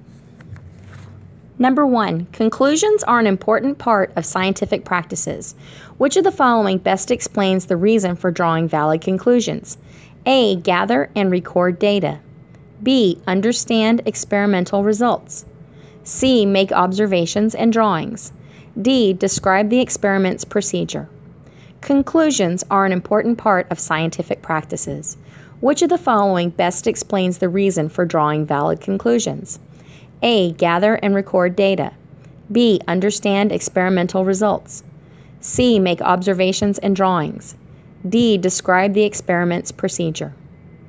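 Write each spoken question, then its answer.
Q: Which of the following best explains the reason for drawing valid conclusions?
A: B: Understand experimental results.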